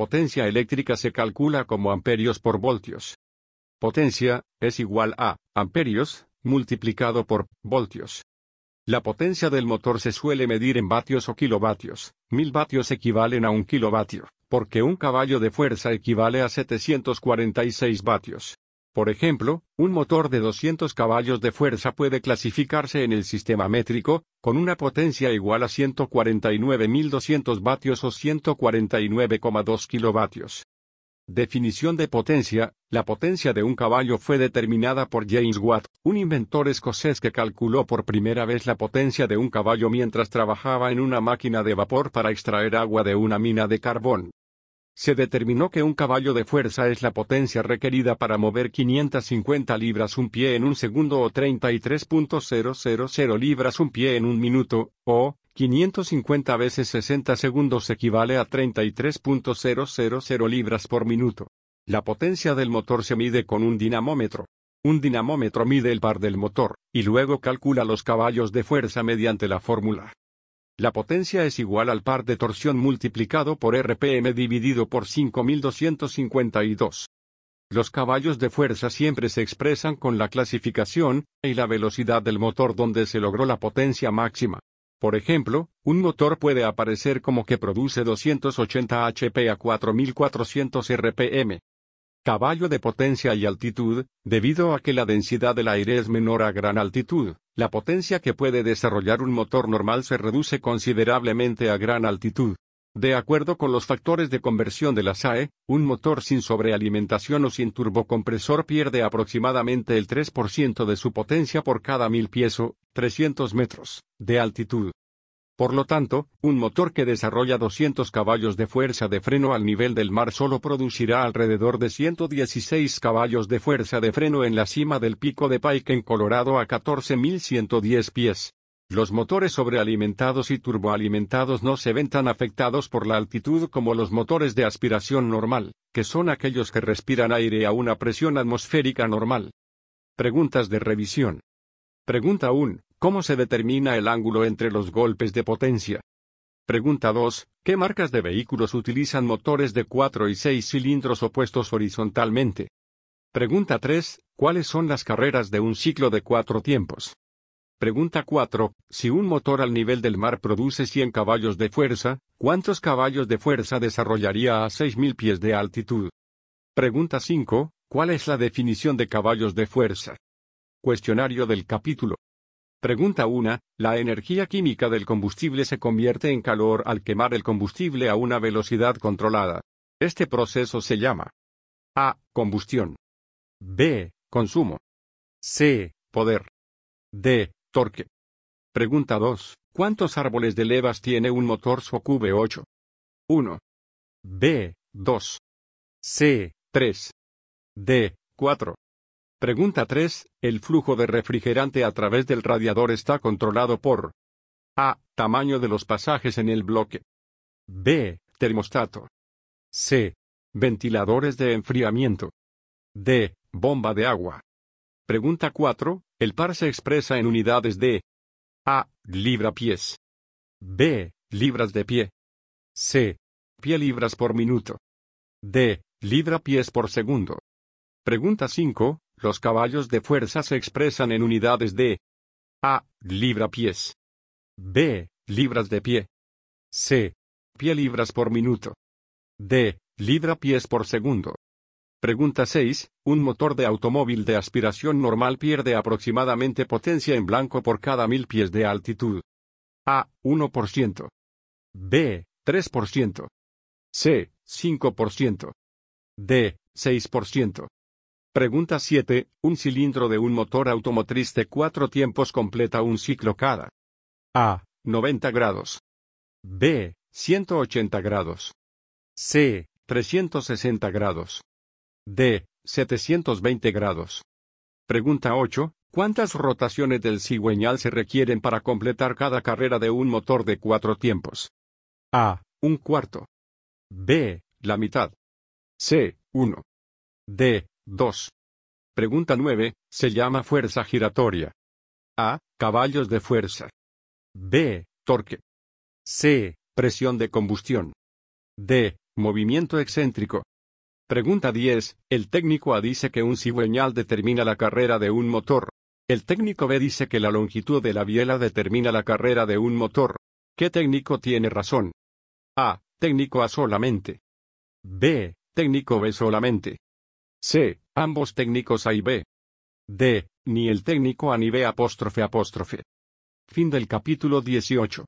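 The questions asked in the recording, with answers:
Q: Si un motor al nivel del mar produce 100 caballos de fuerza, ¿cuántos caballos de fuerza desarrollaría a 6.000 pies de altitud?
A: Unos 82 caballos de fuerza (pierde aproximadamente un 3% por cada 1000 pies)

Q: ¿Cuál es la definición de caballos de fuerza?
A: La potencia necesaria para mover 550 libras un pie en un segundo, o 33.000 libras un pie en un minuto

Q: ¿Los caballos de fuerza se expresan en unidades de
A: C: pie-libras por minuto

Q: ¿Un motor de automóvil de aspiración normal pierde aproximadamente potencia en blanco por cada 1000 pies de altitud?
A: B: 3%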